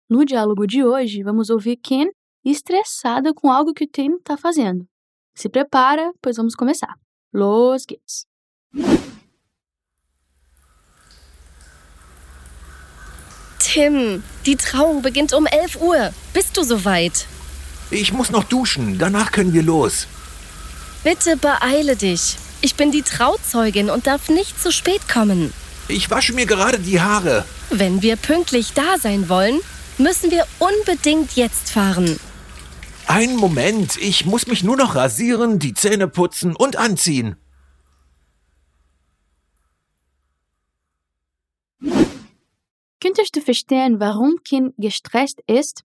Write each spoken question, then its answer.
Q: Könntest du verstehen, warum Kim gestresst ist?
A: Der Grund hängt mit einer Trauung zusammen.